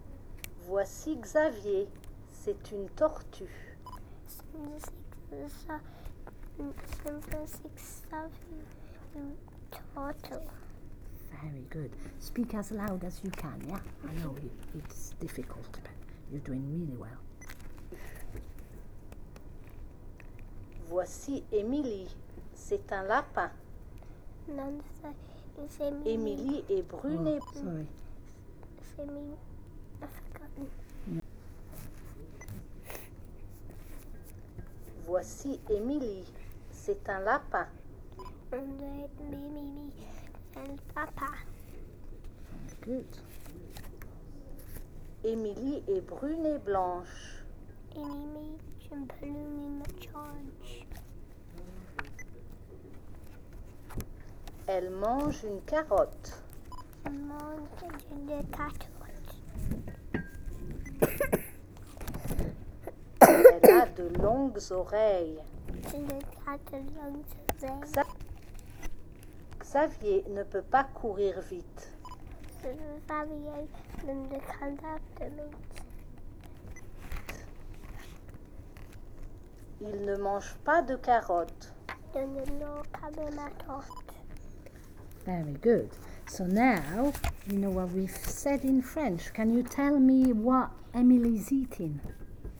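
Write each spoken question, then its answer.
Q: Can you tell me what Emily is eating?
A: A carrot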